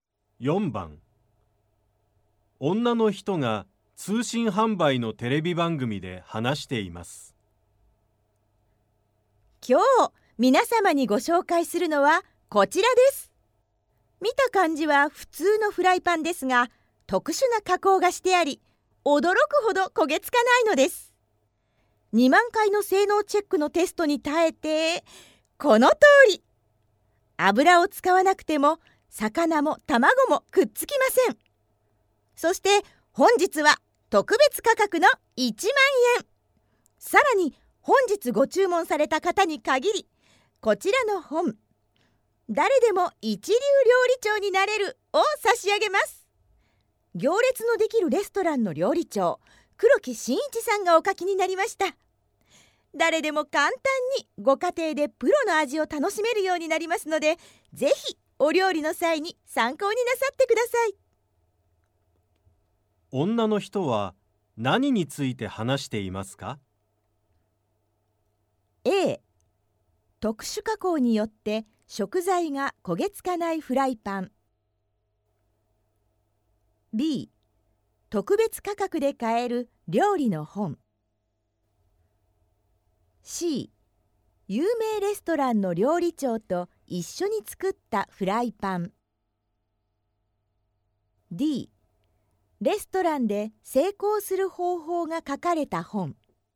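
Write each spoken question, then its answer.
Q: 女の人は何について話していますか?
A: A: 特殊加工によって食材が焦げつかないフライパン。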